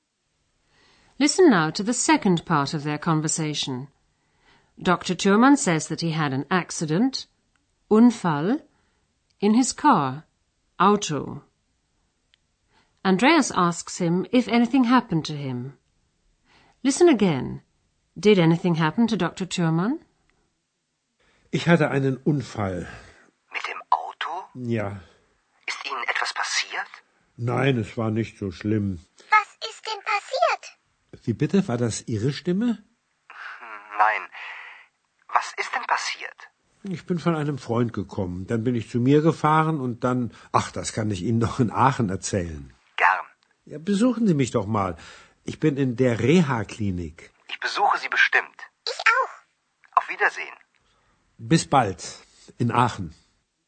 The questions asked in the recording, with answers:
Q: Did anything happen to Dr. Thürmann?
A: At least Dr. Thürmann wasn't seriously injured.